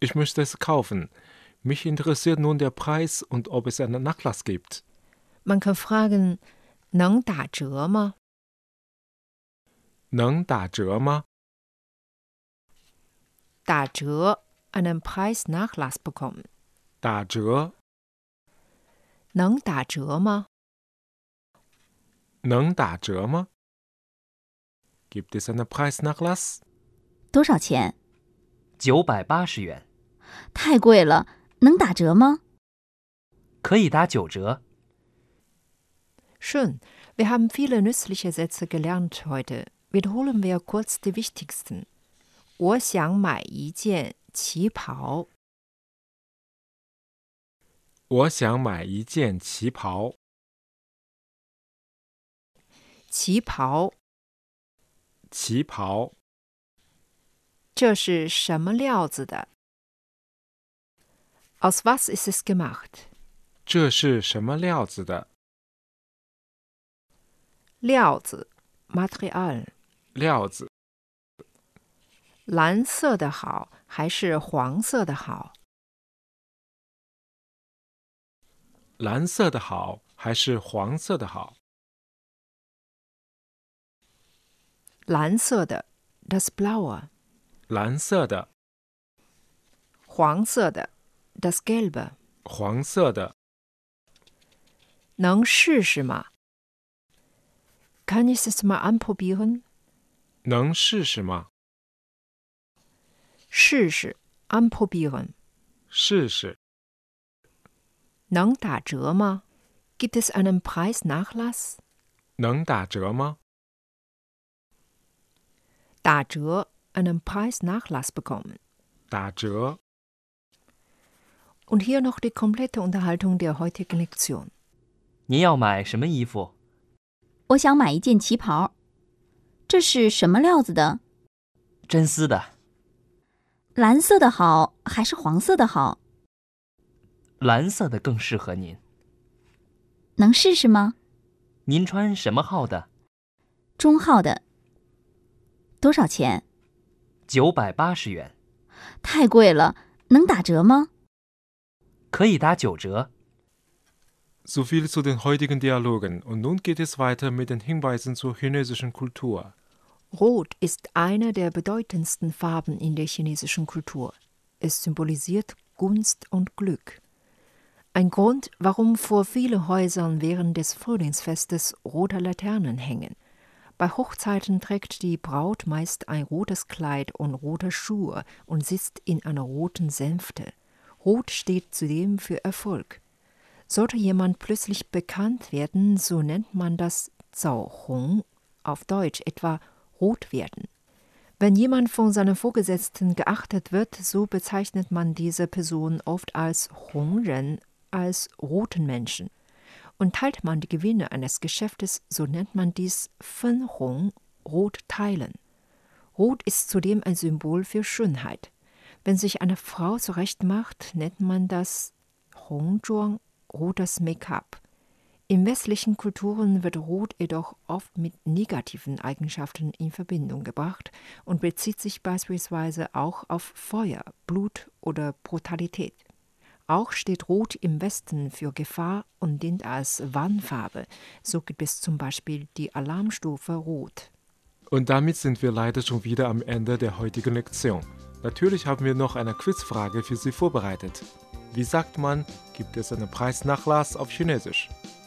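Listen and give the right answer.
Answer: 能打折吗?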